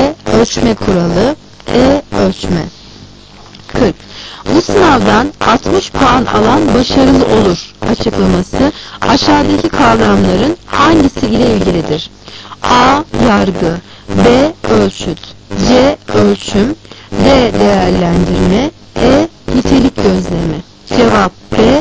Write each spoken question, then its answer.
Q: Bu sınavdan 60 puan alan başarılı olur açıklaması aşağıdaki kavramların hangisi ile ilgilidir?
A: Ölçüt